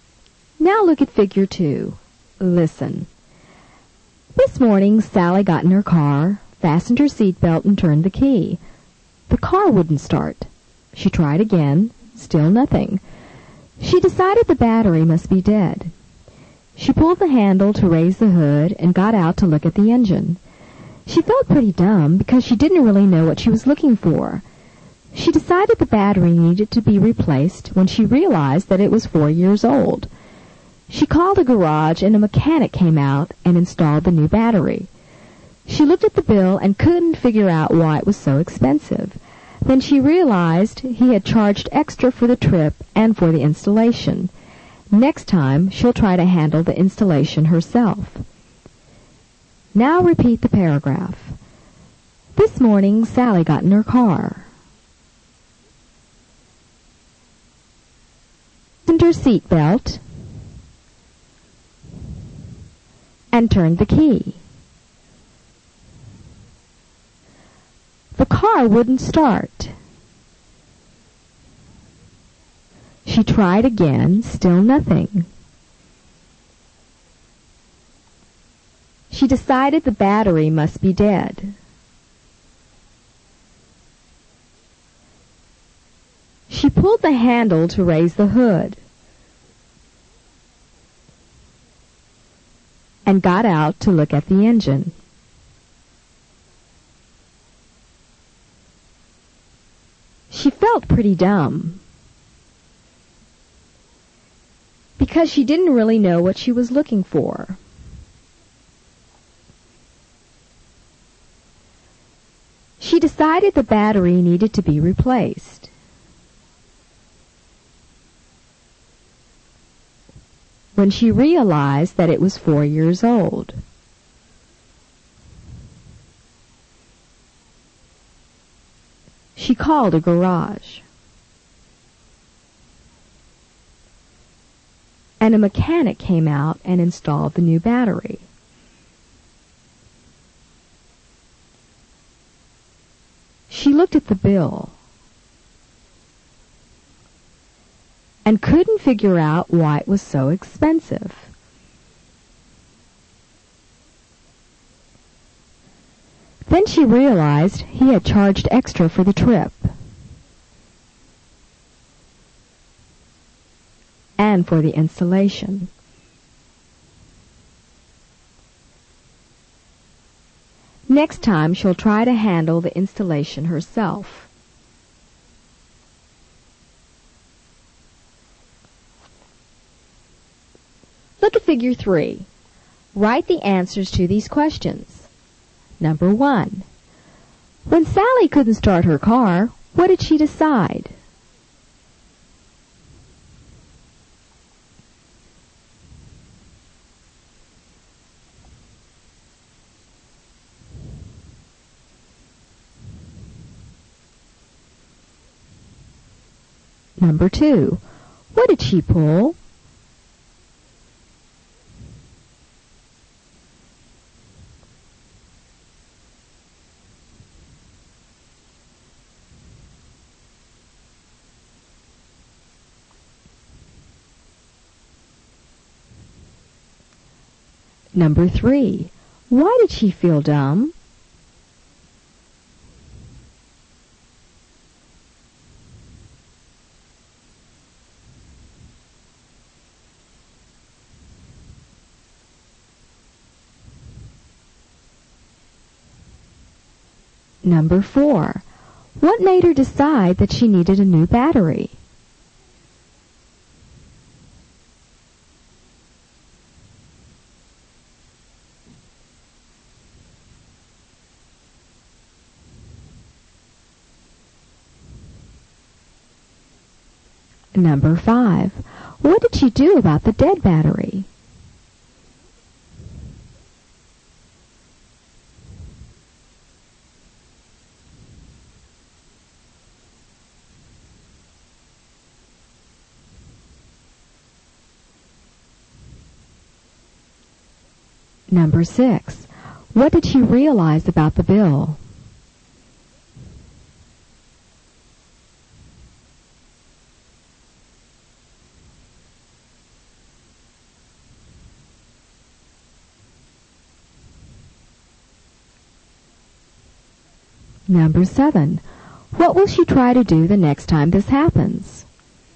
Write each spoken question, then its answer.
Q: When Sally couldn't start her car, what did she decide?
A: She decided the battery must be dead.

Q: What did she pull?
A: She pulled the handle to raise the hood.

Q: Why did she feel dumb?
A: Because she didn't really know what she was looking for.

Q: What made her decide that she needed a new battery?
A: When she realized that it was 4 years old.

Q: What did she do about the dead battery?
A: She called a garage to get a mechanic

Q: What did she realize about the bill?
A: She realized that there was an extra charge.

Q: What will she try to do the next time this happens?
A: Next time, she'll try to handle the installation herself.